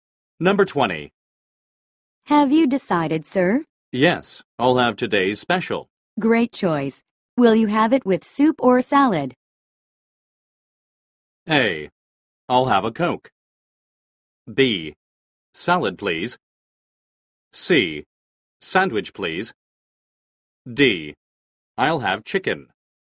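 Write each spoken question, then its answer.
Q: Great choice. Will you have it with soup or salad?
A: B: Salad, please.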